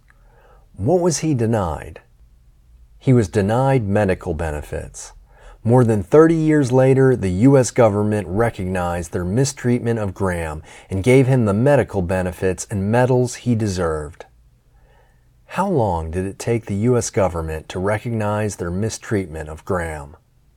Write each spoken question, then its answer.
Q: How long did it take the U.S.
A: It took the U.S. government 30 years to recognize their mistreatment of Graham.